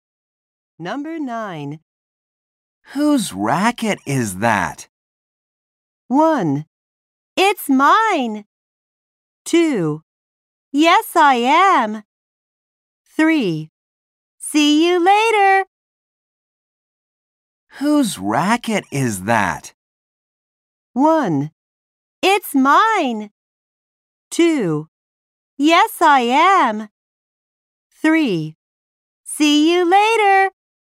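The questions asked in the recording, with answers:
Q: Whose racket is that?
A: 1: It's mine.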